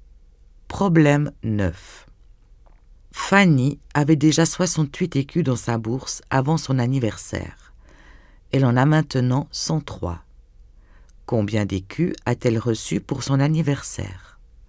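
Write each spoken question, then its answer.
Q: Combien d'écus a-t-elle reçu pour son anniversaire?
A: 35 écus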